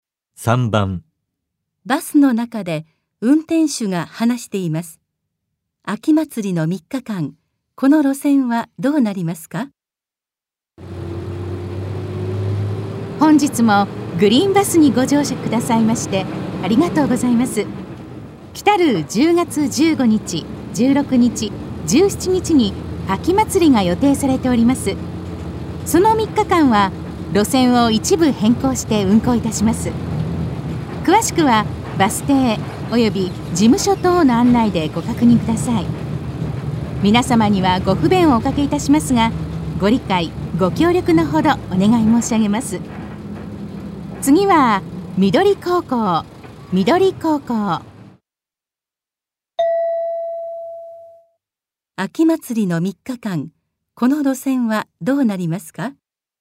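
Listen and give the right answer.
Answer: 路線を一部変更して運行する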